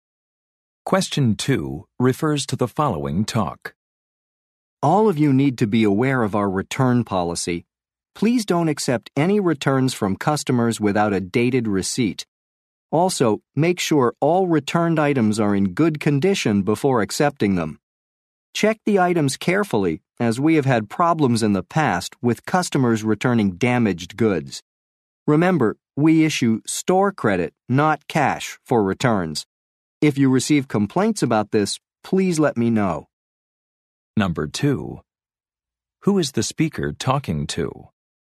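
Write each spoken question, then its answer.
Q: Who is the speaker talking to?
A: Store employees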